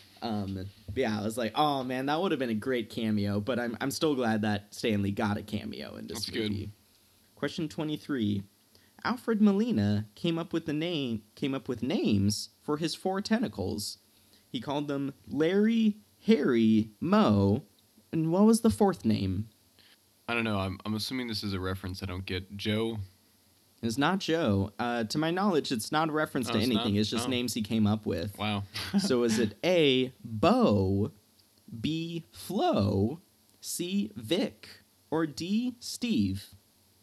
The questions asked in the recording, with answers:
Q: He called them Larry, Harry, Moe, and what was the fourth name?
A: It was Flo.